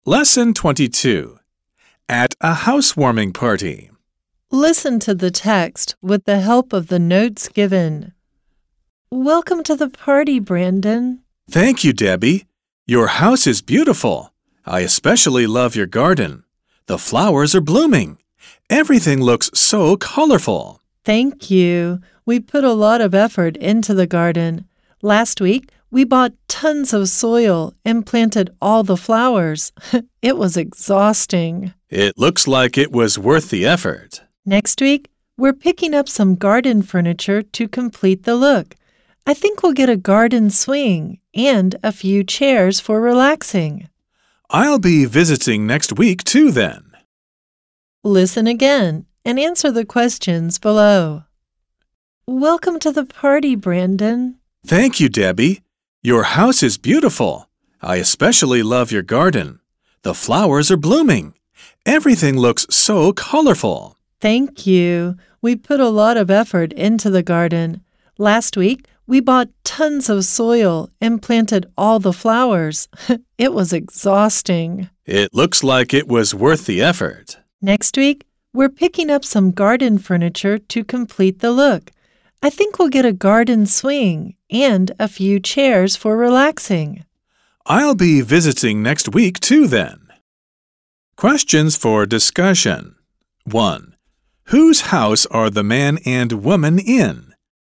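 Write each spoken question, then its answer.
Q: Whose house are the man and woman in?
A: Debbie's house (the woman's)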